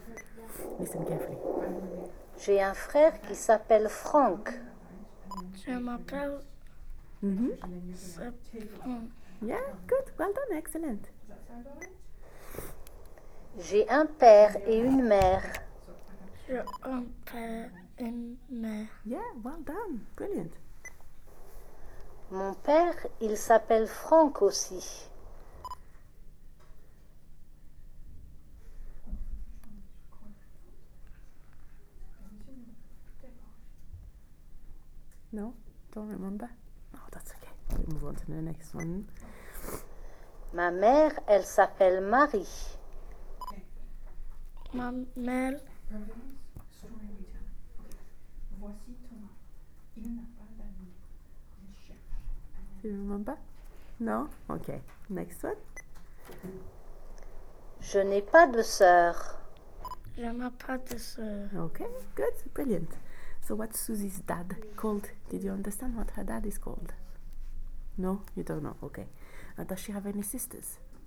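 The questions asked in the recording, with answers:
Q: So, what's Susie's dad called?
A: Franck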